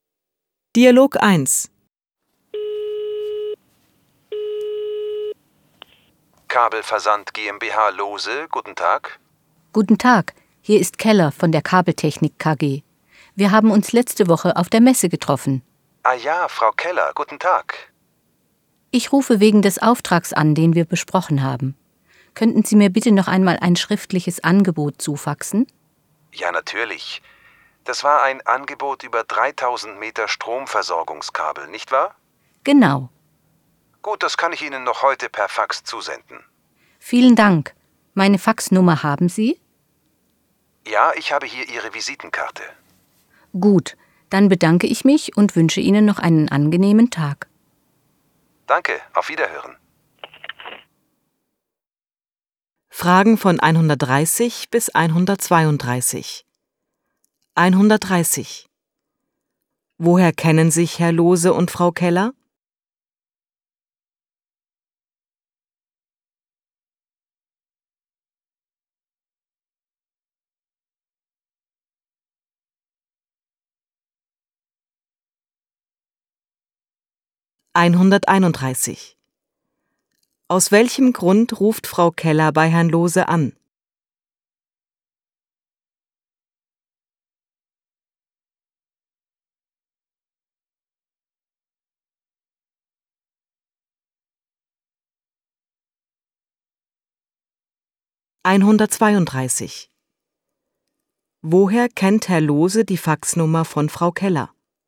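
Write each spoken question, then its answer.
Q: Woher kennen sich Herr Lohse und Frau Keller?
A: Von der Messe letzte Woche

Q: Aus welchem Grund ruft Frau Keller bei Herrn Lohse an?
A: Sie möchte ein schriftliches Angebot per Fax

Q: Woher kennt Herr Lohse die Faxnummer von Frau Keller?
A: Von ihrer Visitenkarte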